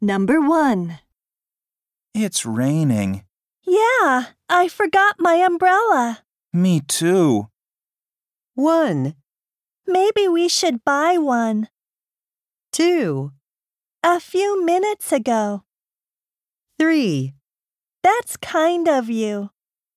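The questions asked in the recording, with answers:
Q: Me too.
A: 1: Maybe we should buy one.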